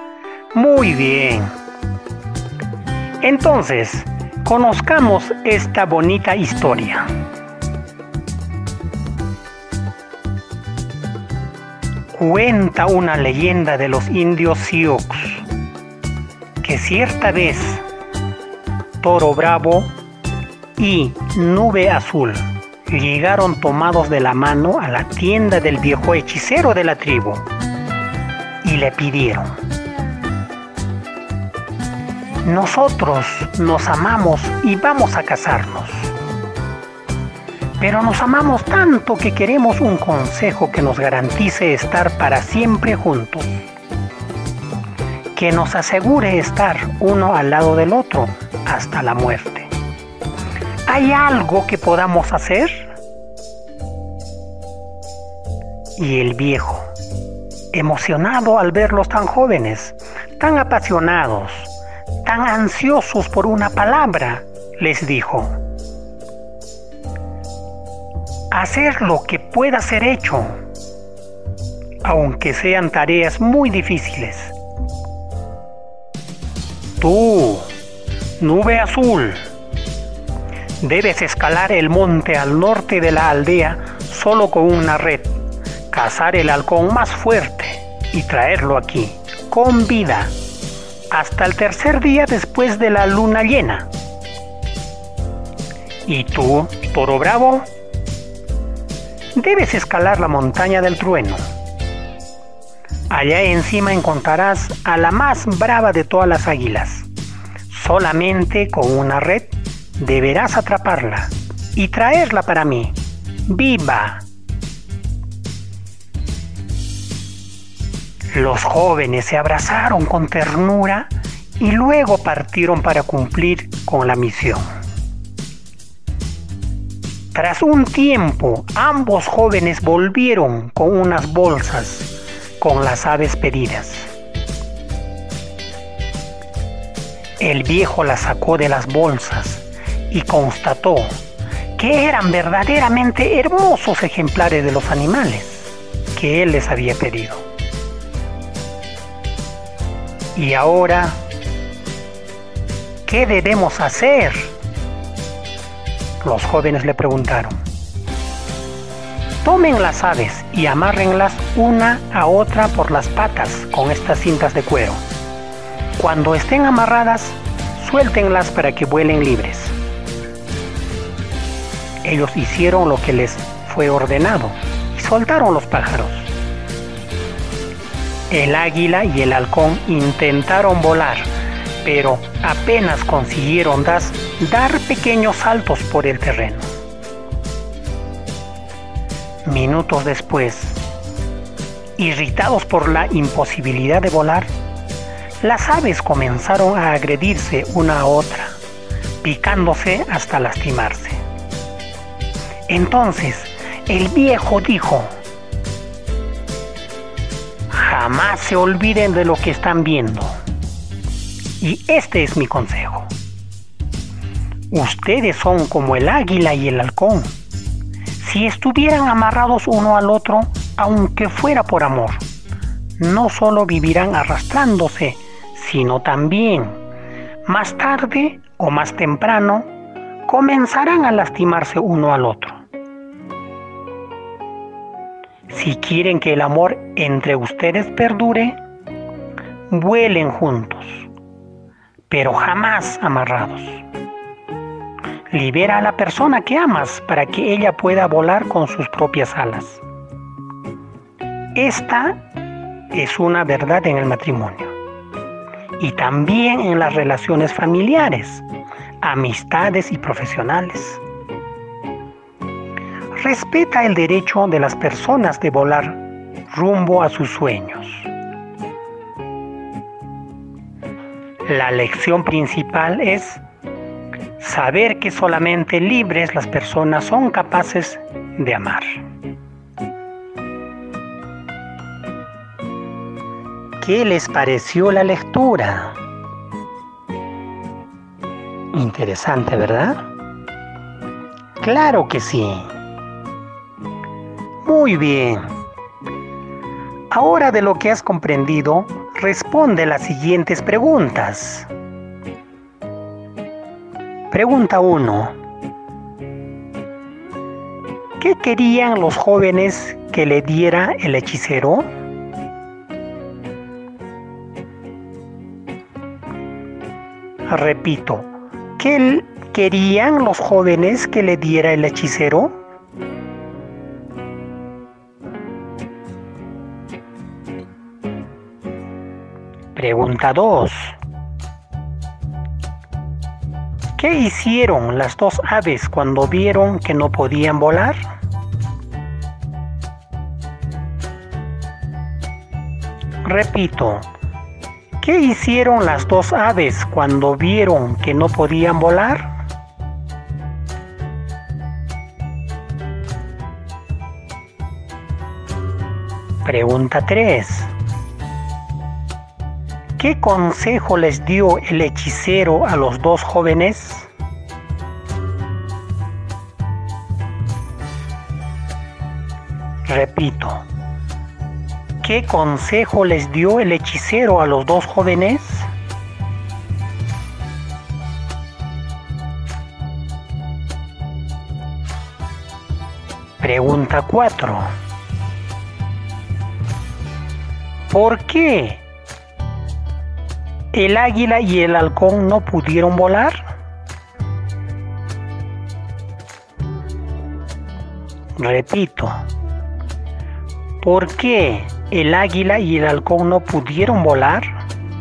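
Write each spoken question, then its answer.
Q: ¿Qué querían los jóvenes que le diera el hechicero?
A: Un consejo que les garantizara estar para siempre juntos

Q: ¿Qué hicieron las dos aves cuando vieron que no podían volar?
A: Comenzaron a agredirse una a otra, picándose hasta lastimarse

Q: ¿Qué consejo les dio el hechicero a los dos jóvenes?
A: Que vuelen juntos, pero jamás amarrados

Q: ¿Por qué el águila y el halcón no pudieron volar?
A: Porque estaban amarrados uno al otro por las patas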